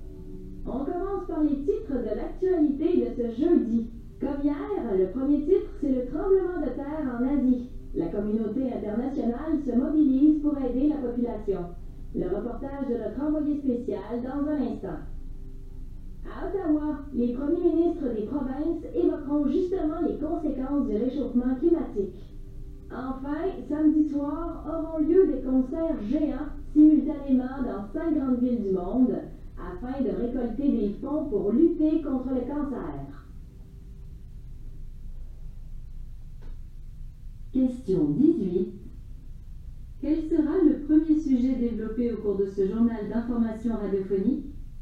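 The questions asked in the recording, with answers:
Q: Quel sera le premier sujet développé au cours de ce journal d'information radiophonique?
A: Le tremblement de terre en Asie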